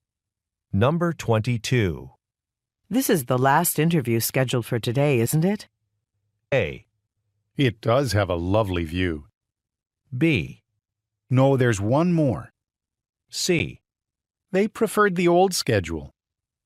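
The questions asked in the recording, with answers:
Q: This is the last interview scheduled for today, isn't it?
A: B: No, there's one more.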